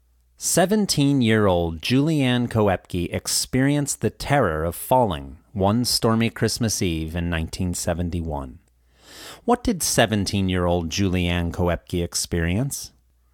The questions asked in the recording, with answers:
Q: What did 17-year-old Julianne Koepke experience?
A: She experienced the terror of falling.